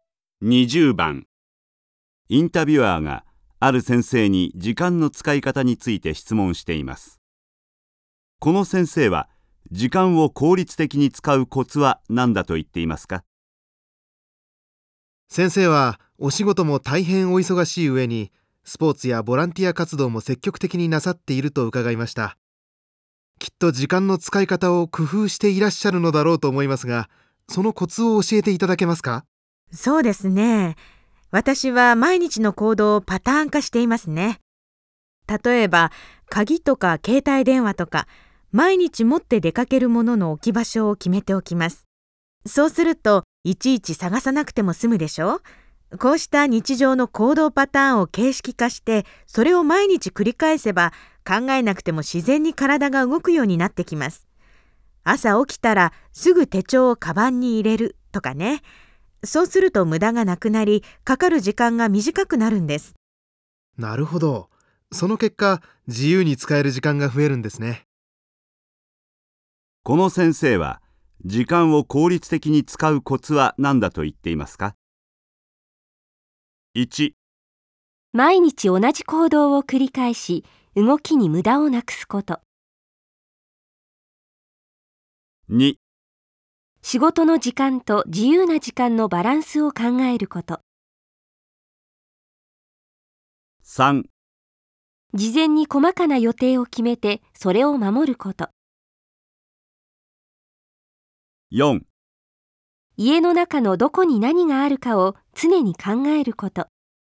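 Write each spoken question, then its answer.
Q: この先生は、時間を効率的に使うコツは何だと言っていますか?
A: 1: 毎日同じ行動を繰り返し、動きに無駄をなくすこと。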